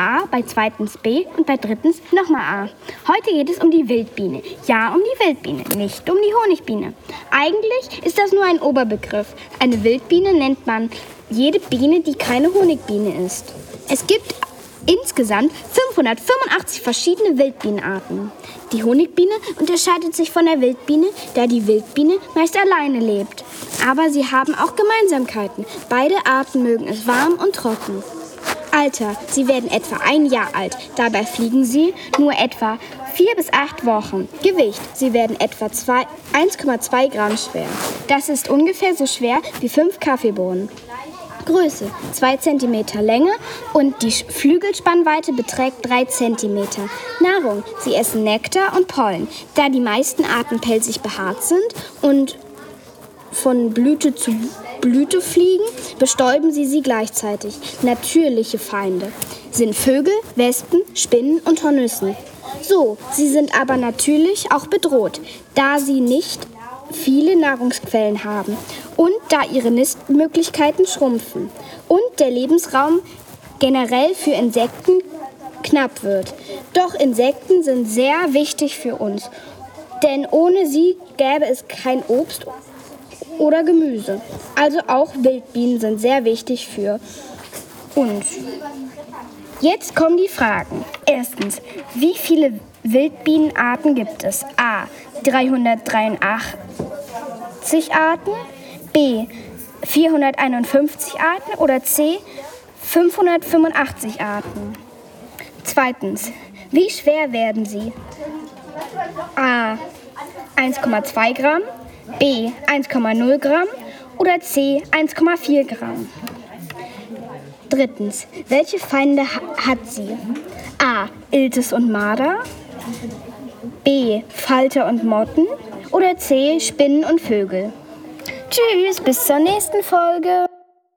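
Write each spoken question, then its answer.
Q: wie viele Wildbienenarten gibt es?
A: C: 585 Arten

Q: wie schwer werden sie?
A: A: 1,2 Gramm

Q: welche Feinde hat sie?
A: C: Spinnen und Vögel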